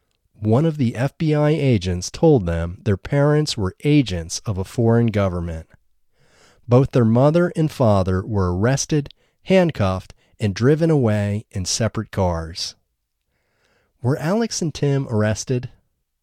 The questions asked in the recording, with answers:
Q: Were Alex and Tim arrested?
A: No, Alex and Tim weren't arrested.